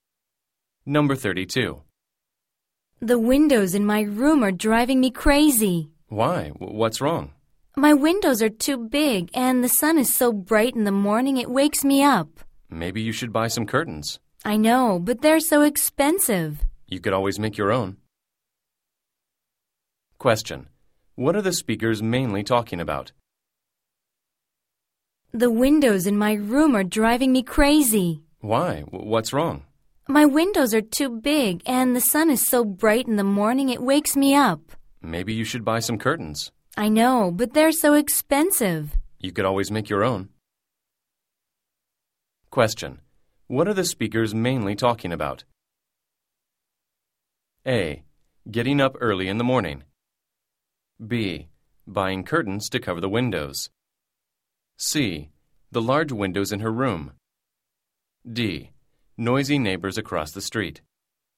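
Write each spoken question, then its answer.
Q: What are the speakers mainly talking about?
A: C: The large windows in her room.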